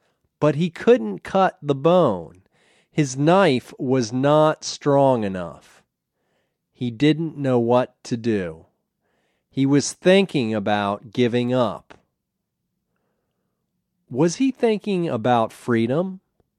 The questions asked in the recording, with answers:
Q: Was he thinking about freedom?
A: No, he wasn't thinking about freedom.